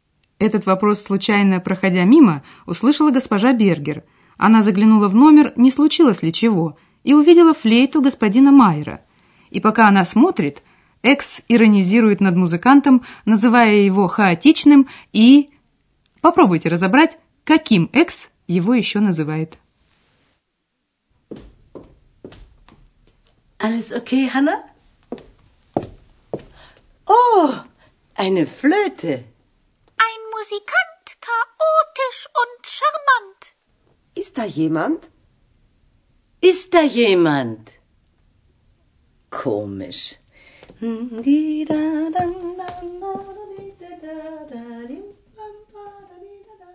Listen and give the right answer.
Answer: Экс называет его шармант, шармантным, приятным.